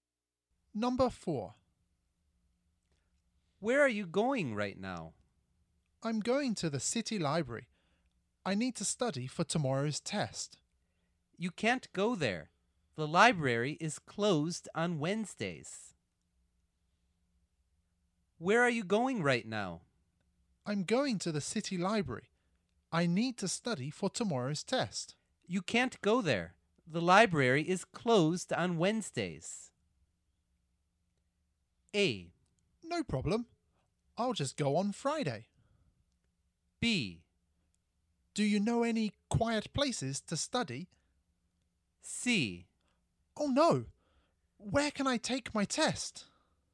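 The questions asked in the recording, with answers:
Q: You can't go there. The library is closed on Wednesdays.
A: B: Do you know any quiet places to study?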